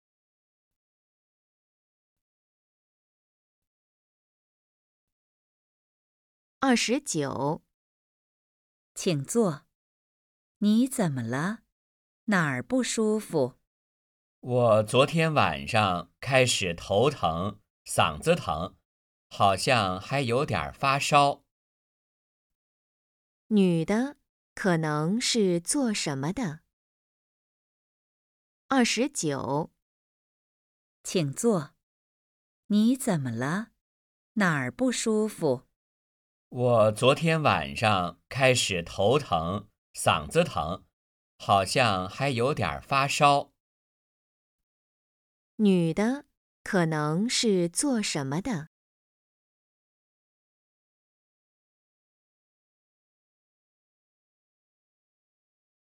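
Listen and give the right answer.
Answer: 医生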